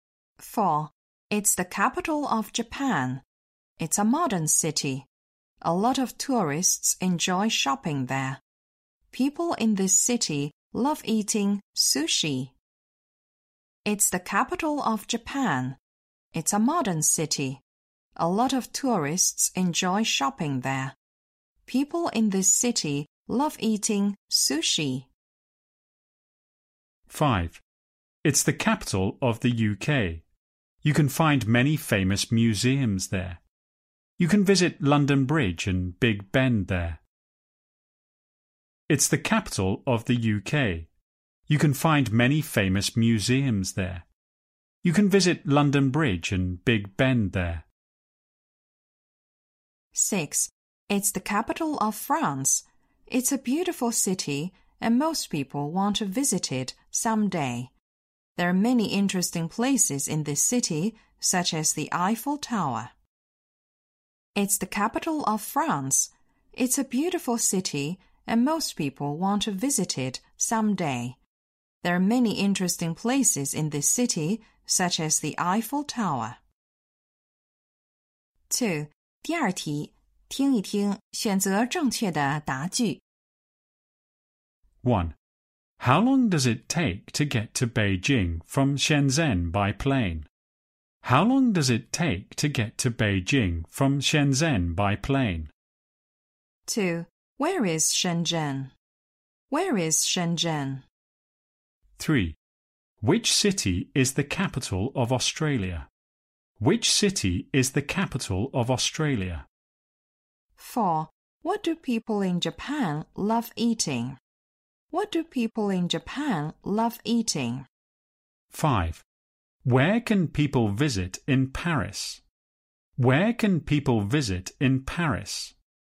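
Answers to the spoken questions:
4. Sushi
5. The Eiffel Tower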